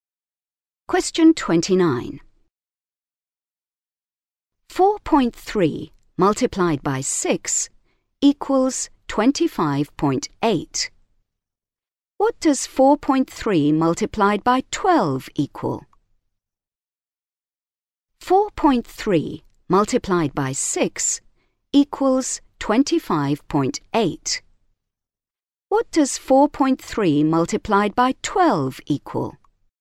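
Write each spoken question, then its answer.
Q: What does 4.3 multiplied by 12 equal?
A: 51.6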